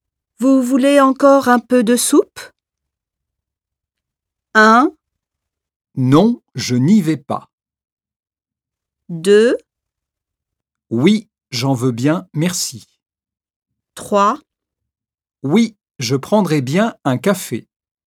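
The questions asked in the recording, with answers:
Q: Vous voulez encore un peu de soupe?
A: 2: Oui, j'en veux bien, merci.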